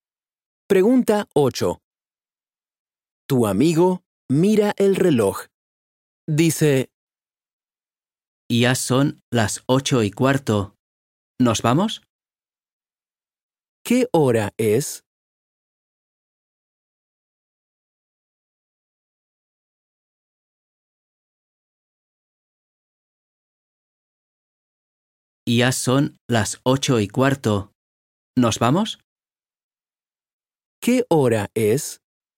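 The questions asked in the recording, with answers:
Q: ¿Qué hora es?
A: Las 8:15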